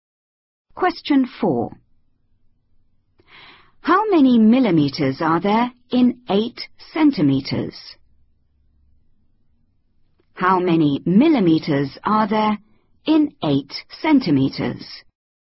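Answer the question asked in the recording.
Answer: 80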